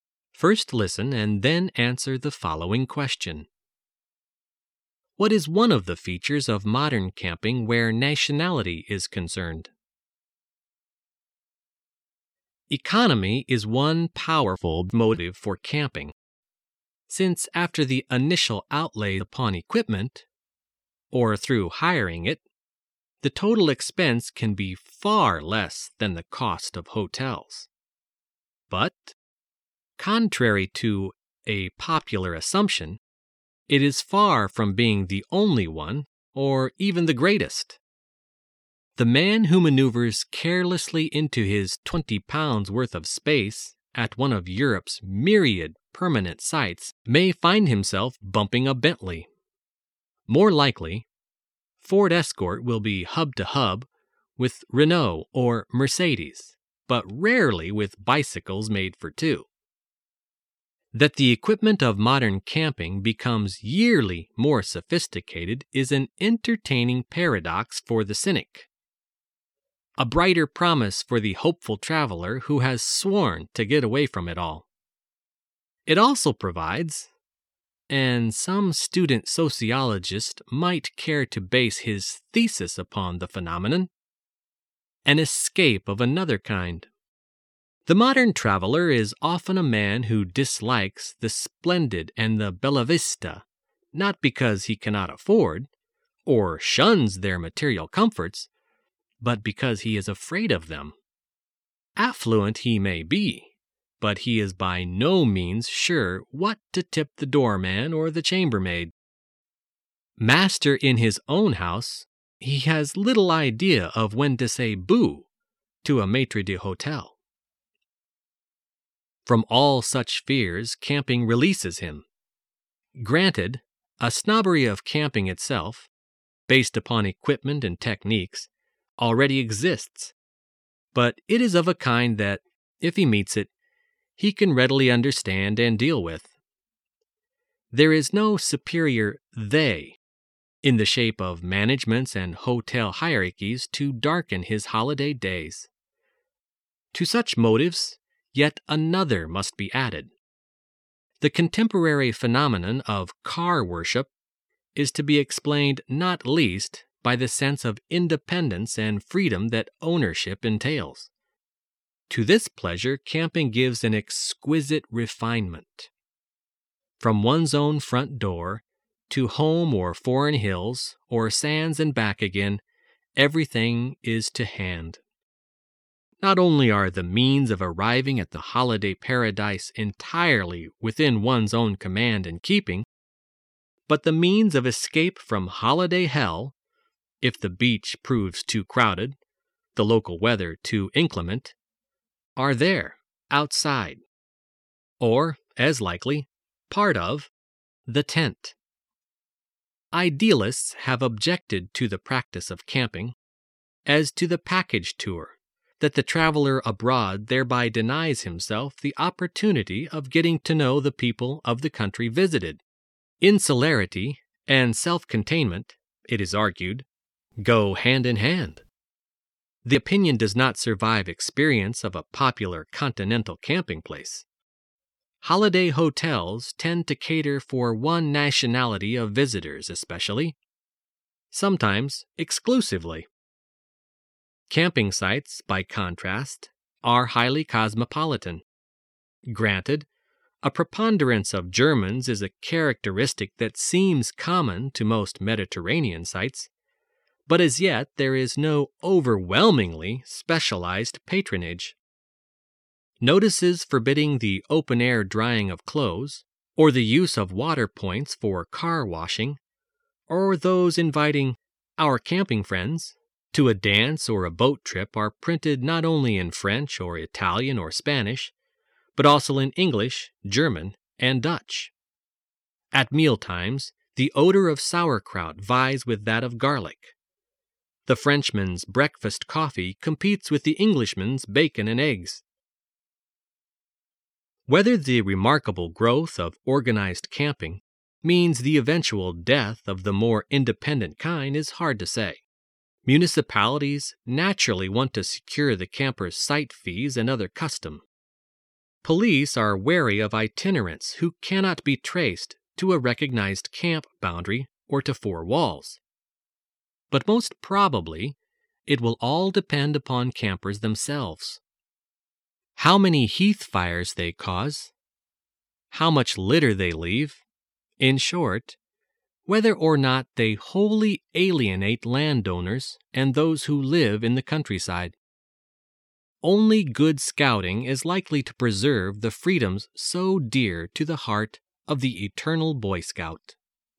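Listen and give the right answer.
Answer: Camping sites are highly cosmopolitan, not catering to one nationality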